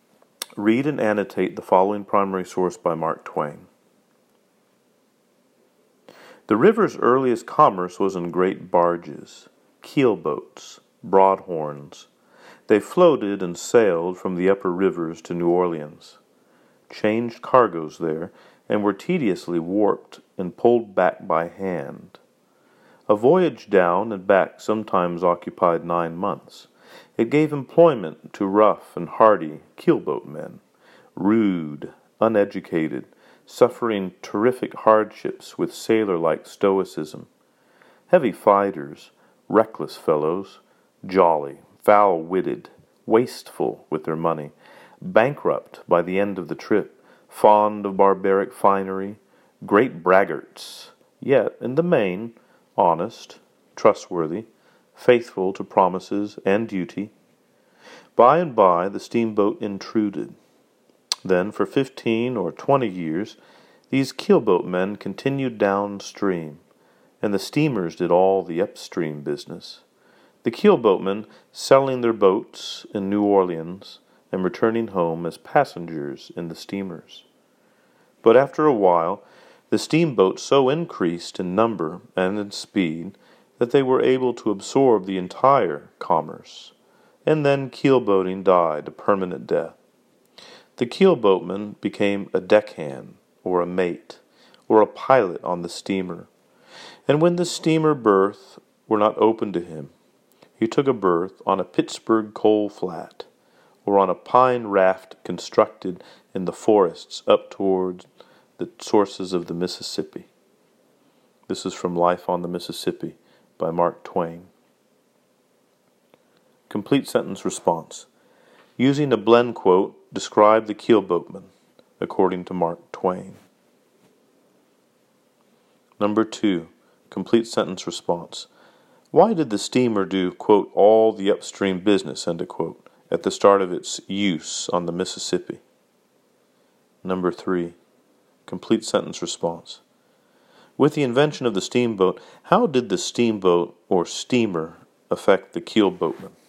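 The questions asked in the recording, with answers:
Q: Using a blend quote, describe the keelboatman, according to Mark Twain.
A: Rough and hardy, rude, uneducated, reckless, heavy fighters, great braggarts, but honest, trustworthy and faithful to promises and duty

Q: With the invention of the steamboat, how did the steamboat or steamer affect the keelboatman?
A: Keelboating died out, so keelboatmen became deckhands, mates or pilots on steamers, or worked on coal flats or pine rafts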